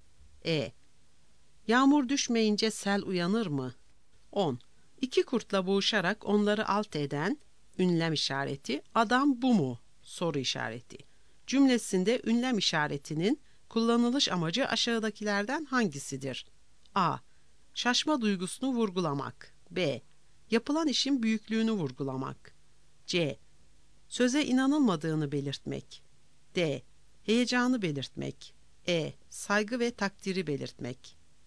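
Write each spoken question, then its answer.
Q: Cümlesinde ünlem işaretinin kullanılış amacı aşağıdakilerden hangisidir?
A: C: Söze inanılmadığını belirtmek.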